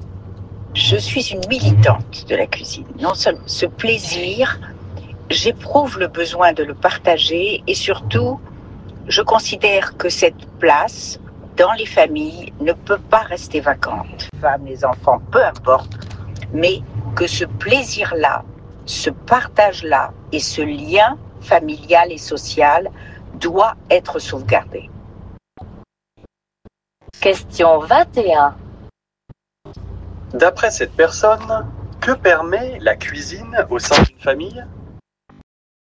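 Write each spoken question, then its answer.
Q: D'après cette personne, que permet la cuisine au sein d'une famille ?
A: Le partage et la préservation du lien familial et social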